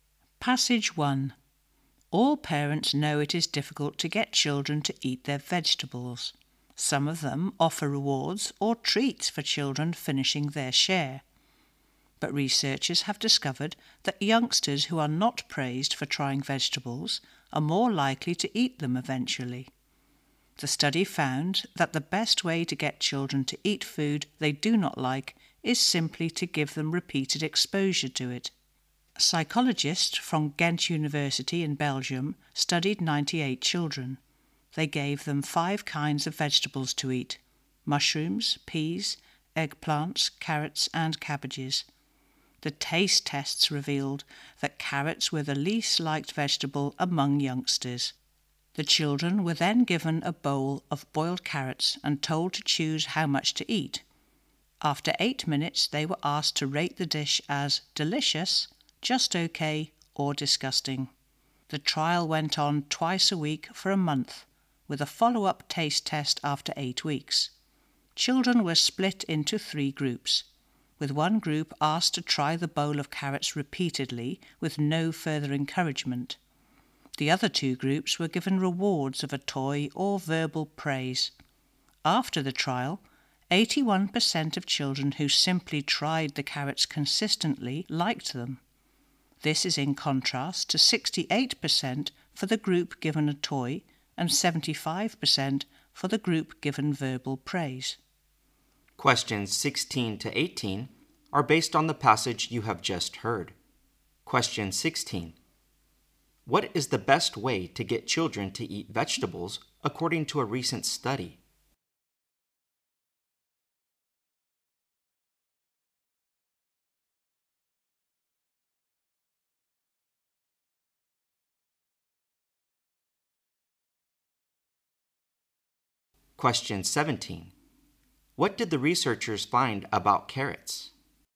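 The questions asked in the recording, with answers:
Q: What is the best way to get children to eat vegetables according to a recent study?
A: Give them repeated exposure to the vegetables.

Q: What did the researchers find about carrots?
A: Carrots were the vegetable children liked least.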